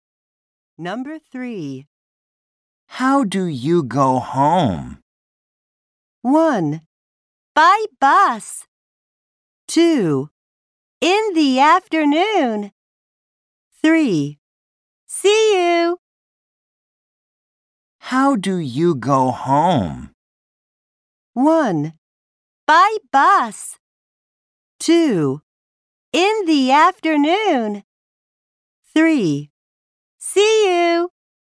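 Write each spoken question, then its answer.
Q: How do you go home?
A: 1: By bus.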